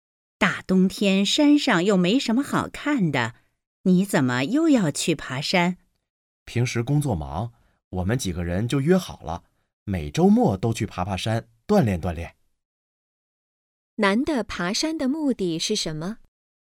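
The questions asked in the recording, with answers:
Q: 男的爬山的目的是什么?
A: 锻炼身体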